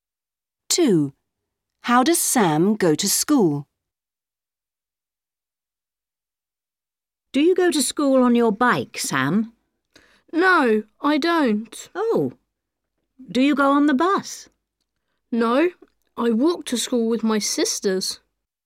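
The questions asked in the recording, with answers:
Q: How does Sam go to school?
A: He walks with his sisters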